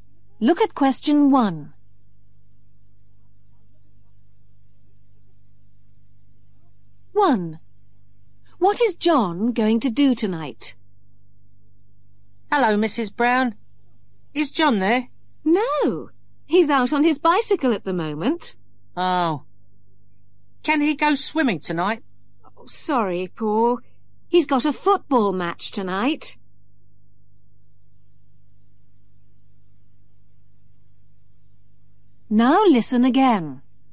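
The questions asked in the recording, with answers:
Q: What is John going to do tonight?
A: play in a football match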